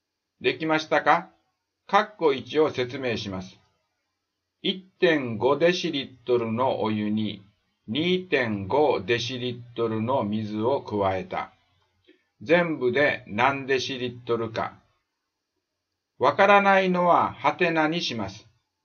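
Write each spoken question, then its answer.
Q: 1.5 デシリットルのお湯に 2.5 デシリットルの水を加えた。 全部で何デシリットルか。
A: 4デシリットル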